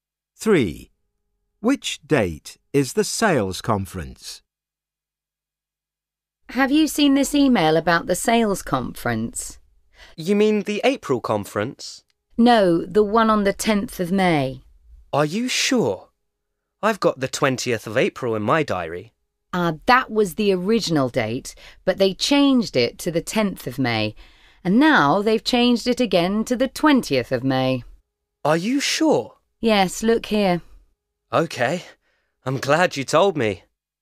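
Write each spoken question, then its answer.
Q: Which date is the sales conference?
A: The 20th of May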